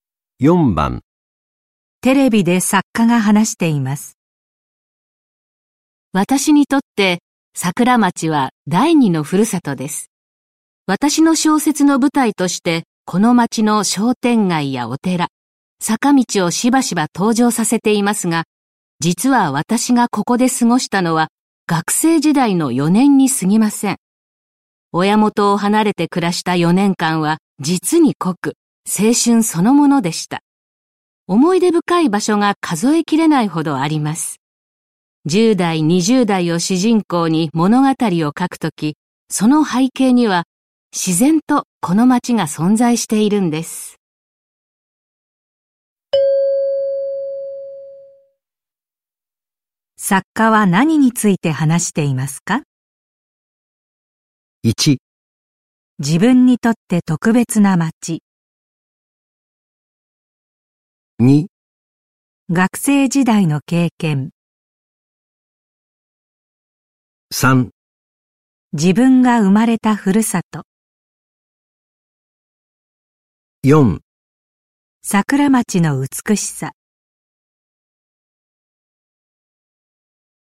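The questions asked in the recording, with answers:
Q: 作家は何について話していますか?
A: 1: 自分にとって特別な街。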